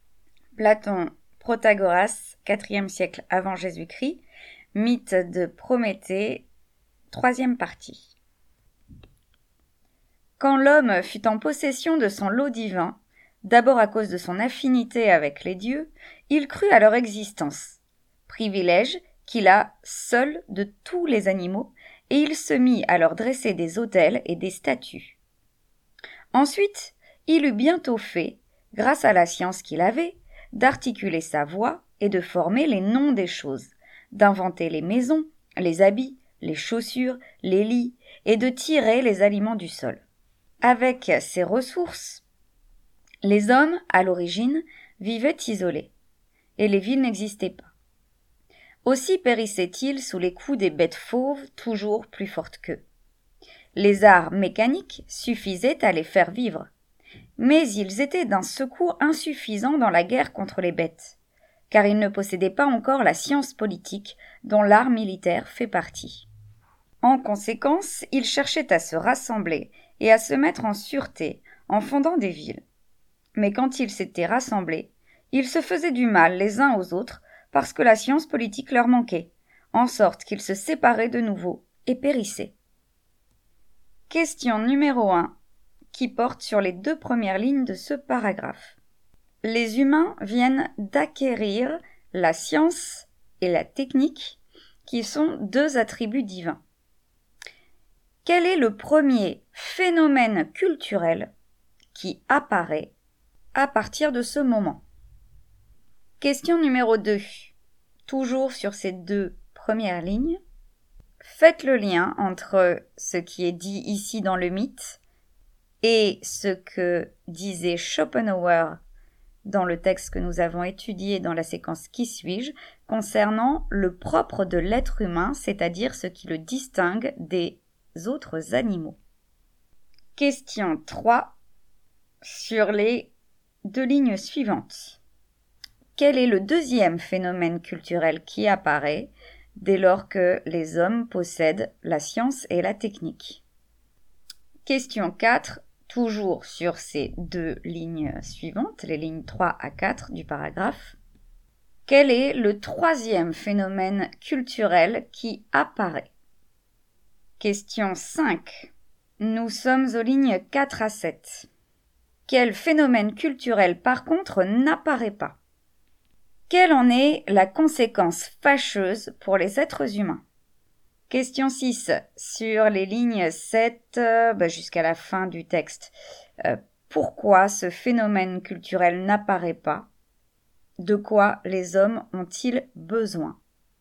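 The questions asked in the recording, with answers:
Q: Quel est le premier phénomène culturel qui apparaît à partir de ce moment?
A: La religion : l'homme croit aux dieux et leur dresse des autels et des statues

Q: Quel est le deuxième phénomène culturel qui apparaît dès lors que les hommes possèdent la science et la technique?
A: Le langage : articuler sa voix et nommer les choses

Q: quel est le troisième phénomène culturel qui apparaît?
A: Les techniques : maisons, habits, chaussures, lits, agriculture

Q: Quel phénomène culturel, par contre, n'apparaît pas?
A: Les villes (la vie en société)

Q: Quelle en est la conséquence fâcheuse pour les êtres humains?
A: Ils vivent isolés et périssent sous les coups des bêtes fauves

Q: Pourquoi ce phénomène culturel n'apparaît pas?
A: Parce que, rassemblés, ils se font du mal les uns aux autres faute de science politique

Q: De quoi les hommes ont-ils besoin?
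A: De la science politique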